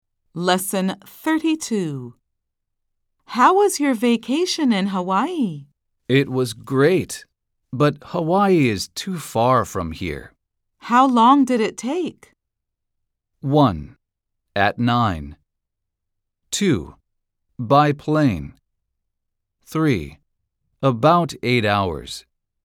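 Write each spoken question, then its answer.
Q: How long did it take?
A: 3: About 8 hours.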